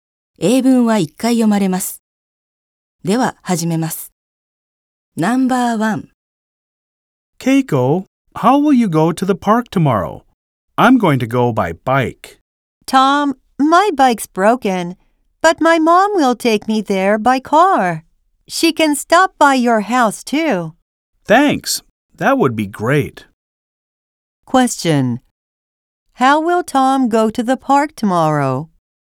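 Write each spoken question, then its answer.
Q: How will Tom go to the park tomorrow?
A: By car (his mom will take him).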